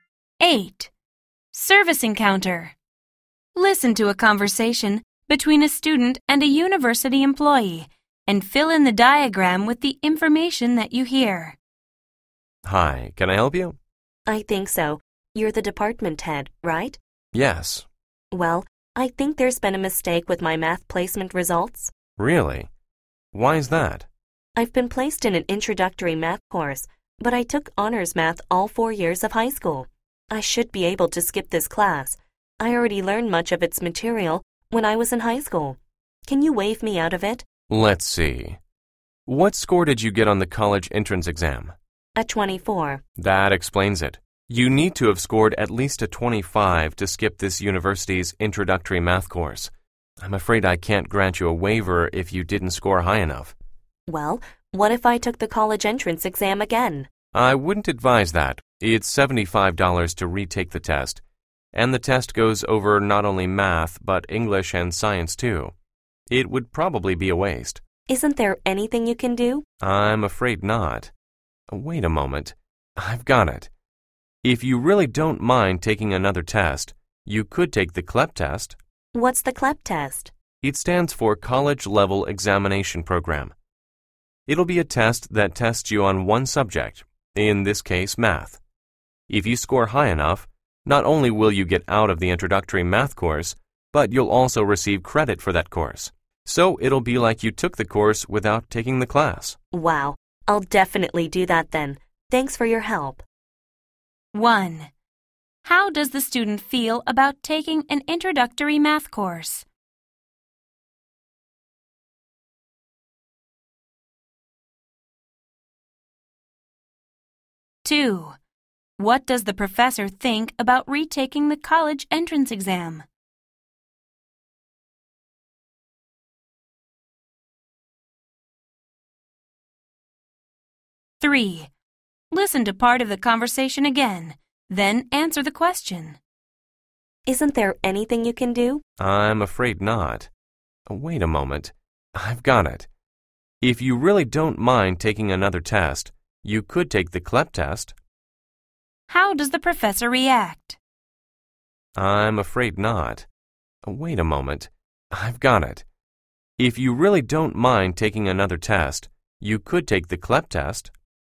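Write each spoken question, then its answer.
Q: How does the student feel about taking an introductory math course?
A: He thinks it's unnecessary because he already learned the material in high school.

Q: What does the professor think about retaking the college entrance exam?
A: It would probably be a waste; it costs $75 and covers other subjects too.

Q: How does the professor react?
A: She suddenly thinks of a solution: the CLEP test.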